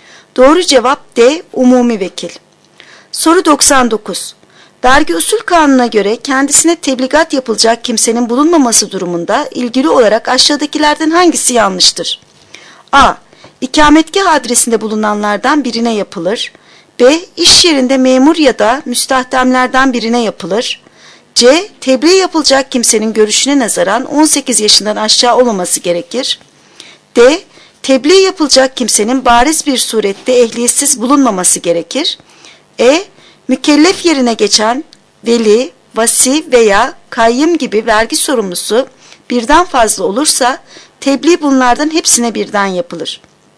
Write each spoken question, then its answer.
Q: Vergi Usul Kanunu'na göre kendisine tebligat yapılacak kimsenin bulunmaması durumunda ilgili olarak aşağıdakilerden hangisi yanlıştır?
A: Doğru cevap E. Mükellef yerine geçen veli, vasi veya kayyım gibi vergi sorumlusu birden fazla olursa tebliğ bunların hepsine birden yapılır.